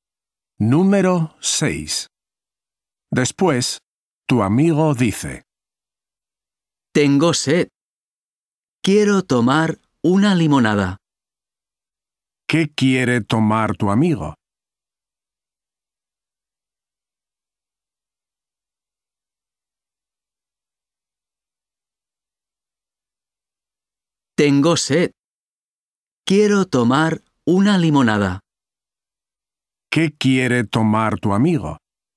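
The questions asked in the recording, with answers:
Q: ¿Qué quiere tomar tu amigo?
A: Una limonada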